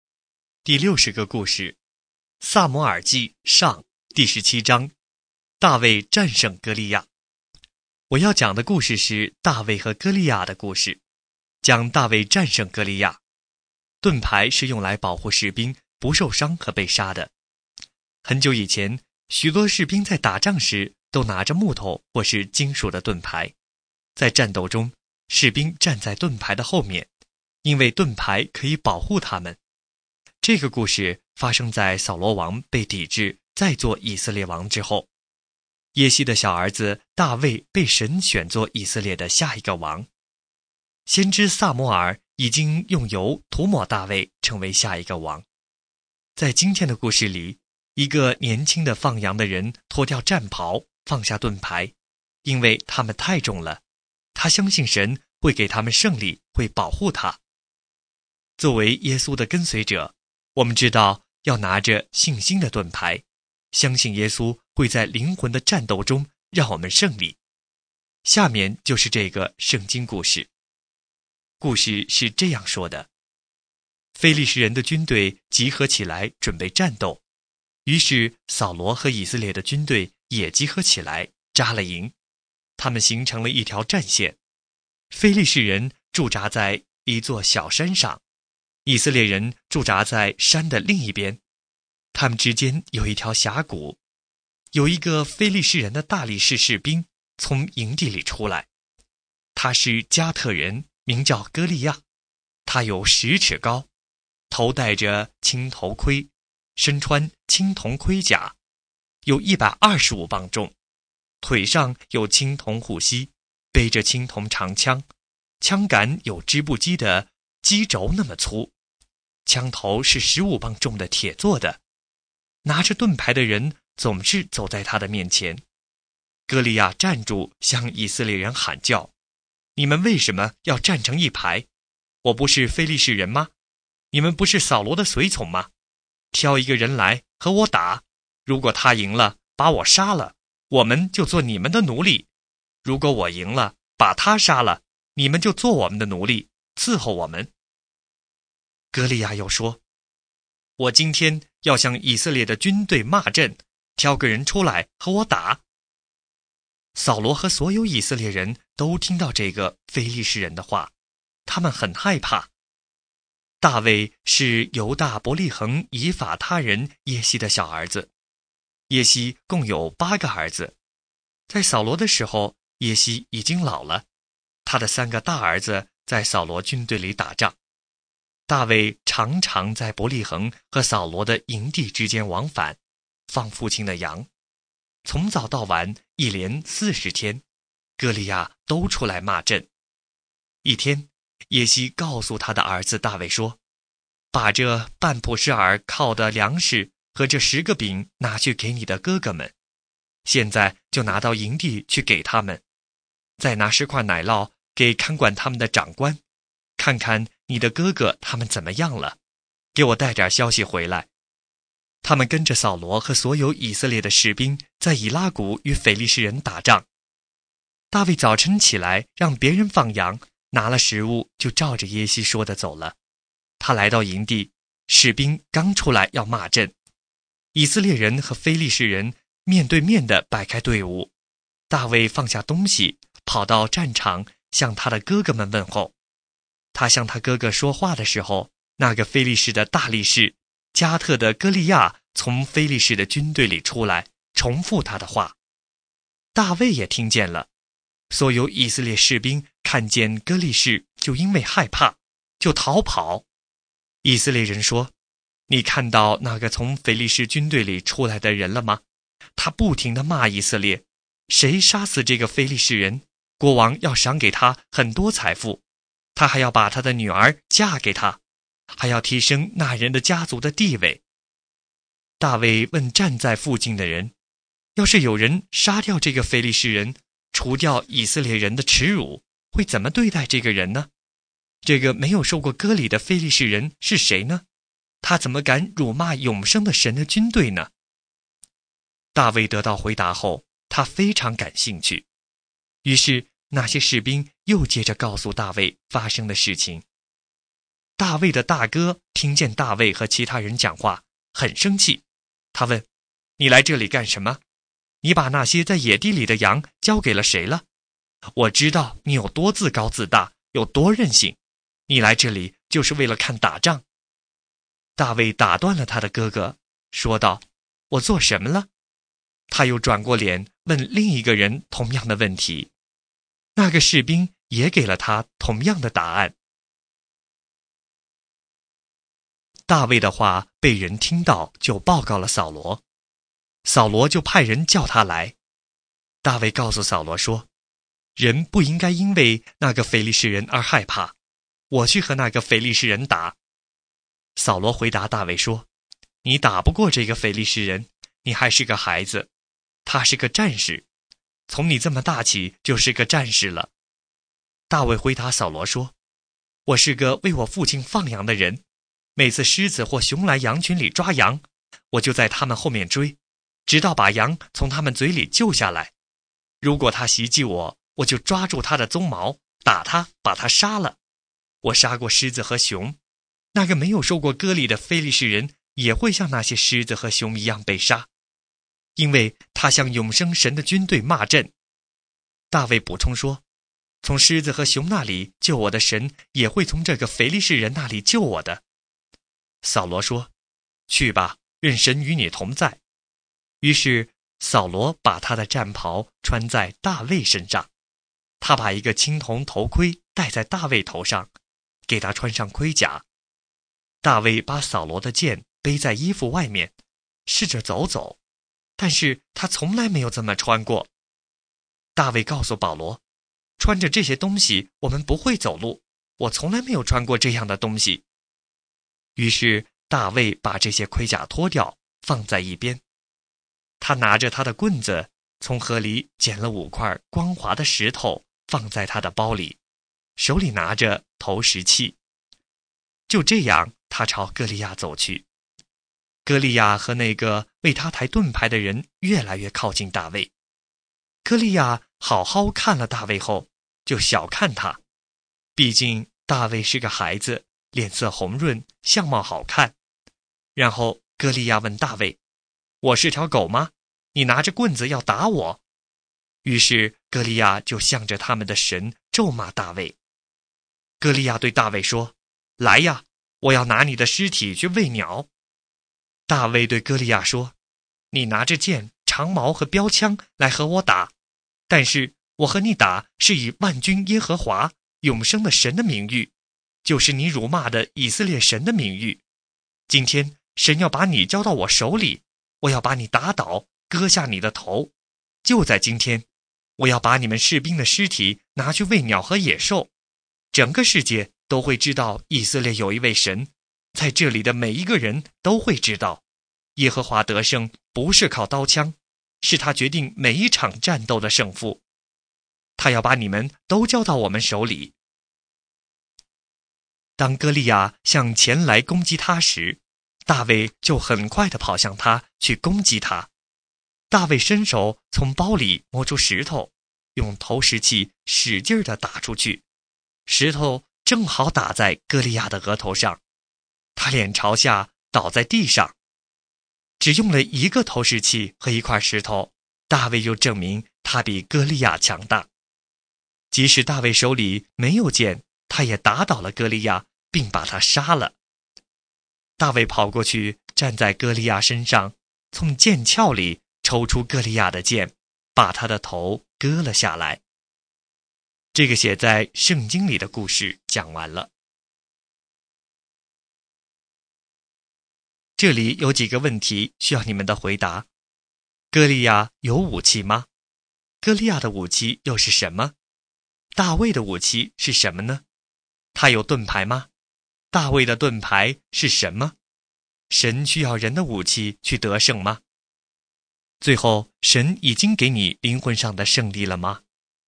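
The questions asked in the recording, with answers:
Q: 哥利亚的武器又是什么?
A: 剑、长矛和标枪(还有青铜盔甲、头盔和盾牌)

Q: 大卫的武器是什么呢?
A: 投石器和石头(还有棍子)

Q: 神需要人的武器去得胜吗?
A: 不需要,耶和华得胜不是靠刀枪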